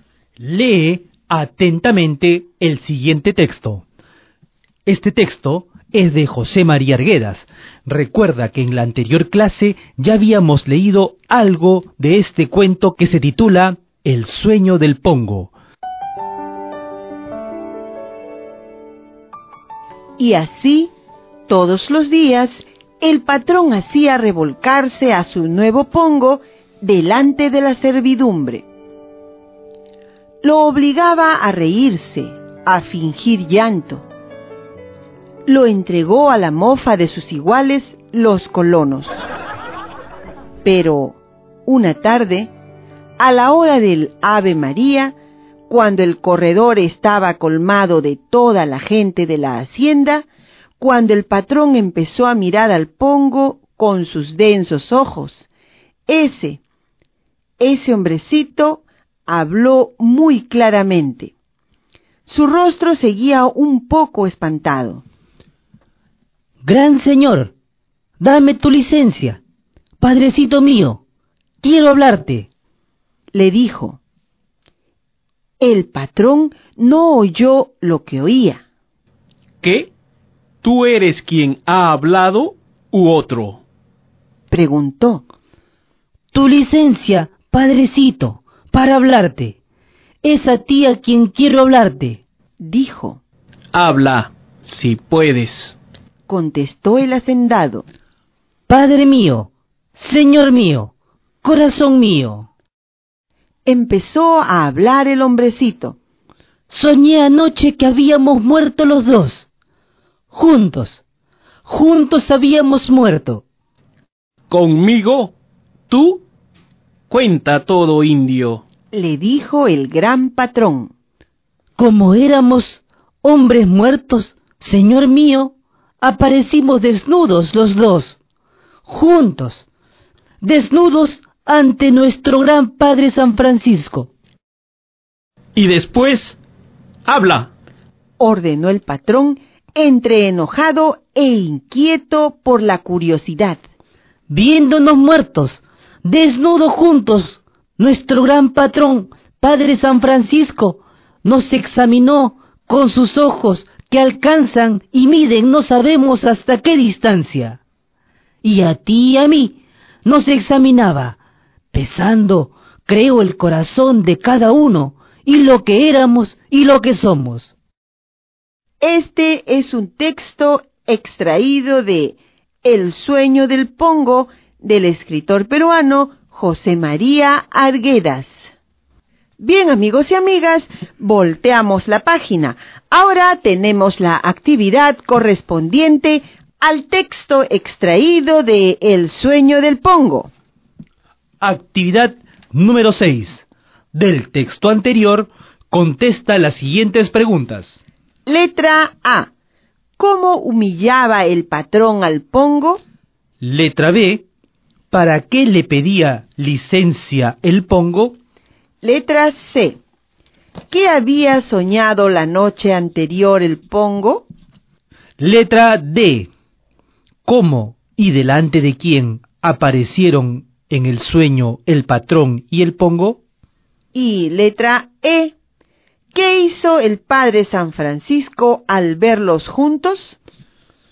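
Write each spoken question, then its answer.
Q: ¿Cómo humillaba el patrón al pongo?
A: Lo hacía revolcarse delante de la servidumbre, lo obligaba a reírse y a fingir llanto, y lo entregó a la mofa de los colonos

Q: ¿Para qué le pedía licencia el pongo?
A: Para hablarle al patrón

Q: ¿Qué había soñado la noche anterior el pongo?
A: Que habían muerto los dos juntos, él y el patrón

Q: ¿Cómo y delante de quién aparecieron en el sueño el patrón y el pongo?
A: Desnudos, juntos, delante del padre San Francisco

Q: ¿Qué hizo el padre San Francisco al verlos juntos?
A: Los examinó con sus ojos, pesando el corazón de cada uno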